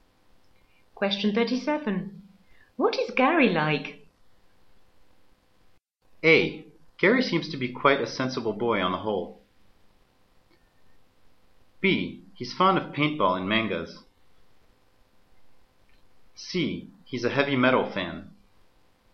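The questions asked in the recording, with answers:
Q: What is Gary like?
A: A: Gary seems to be quite a sensible boy on the whole.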